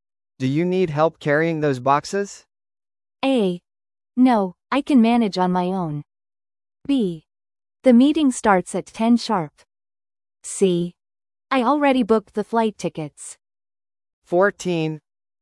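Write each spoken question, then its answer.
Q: Do you need help carrying those boxes?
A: A: No, I can manage on my own.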